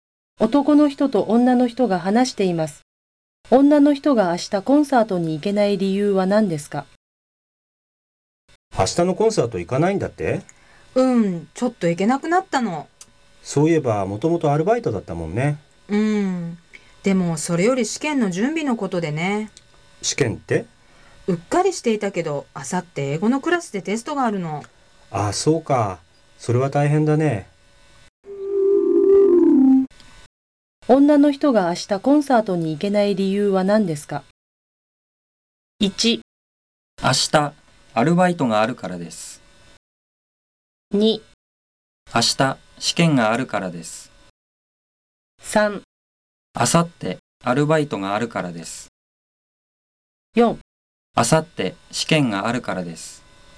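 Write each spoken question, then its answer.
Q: 女の人が明日コンサートに行けない理由は何ですか?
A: 4: あさって試験があるからです。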